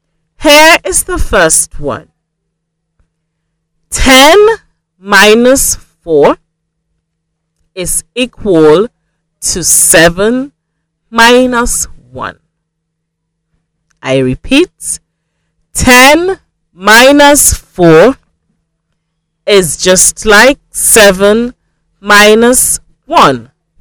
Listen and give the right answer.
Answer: 10 minus 4 is equal to 7 minus 1.